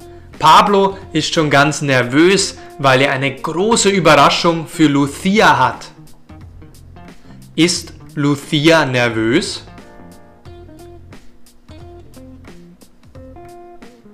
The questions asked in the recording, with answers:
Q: Ist Lucia nervös?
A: Nein, Lucia ist nicht nervös.